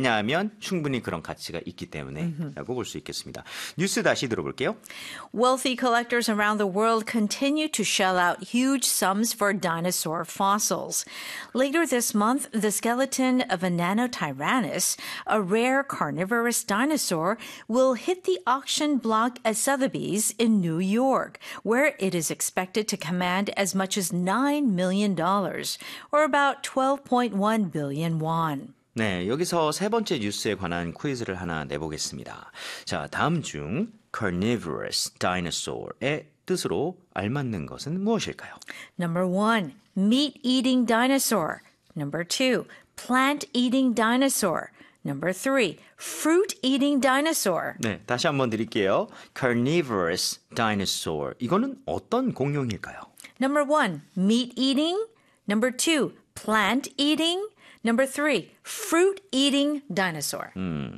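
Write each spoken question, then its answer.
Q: 자, 다음 중 carnivorous dinosaur의 뜻으로 알맞는 것은 무엇일까요?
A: 1: meat-eating dinosaur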